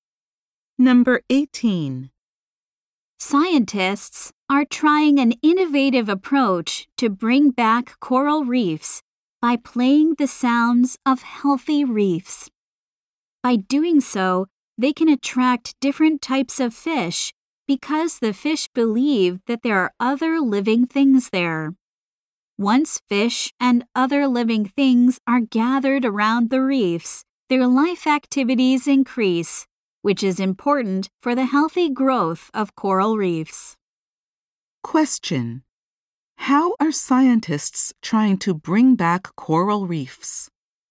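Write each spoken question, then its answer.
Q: How are scientists trying to bring back coral reefs?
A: By playing sounds of healthy reefs to attract fish.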